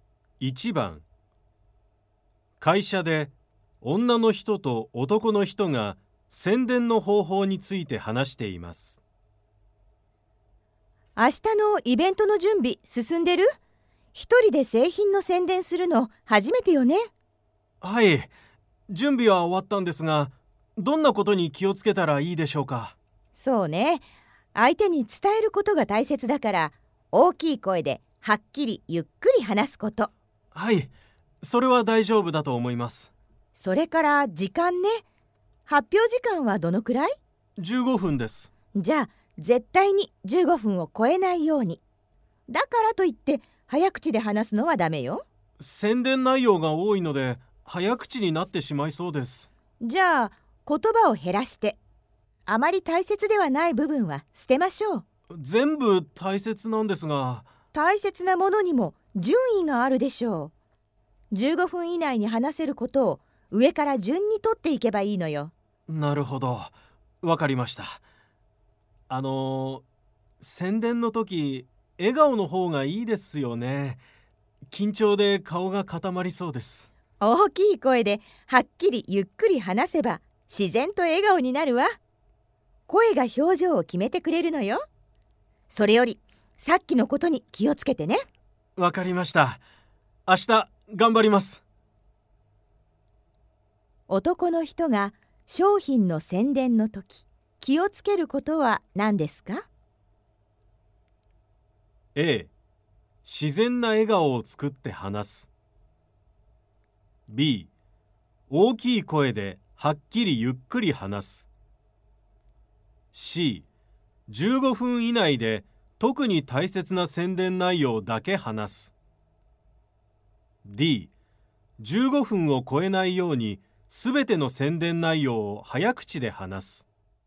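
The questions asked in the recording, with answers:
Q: 男の人が商品の宣伝の時、気をつけることは何ですか?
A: C: 15分以内で特に大切な宣伝内容だけ話す。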